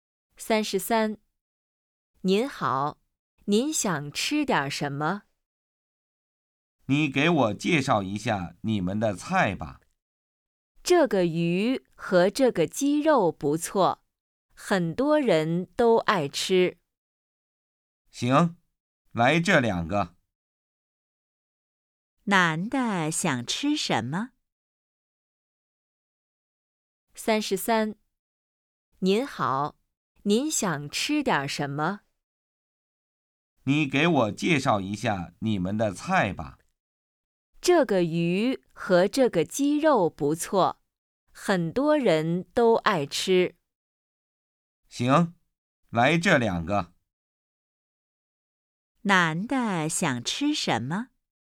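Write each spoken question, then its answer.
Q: 男的想吃什么?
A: 鱼和鸡肉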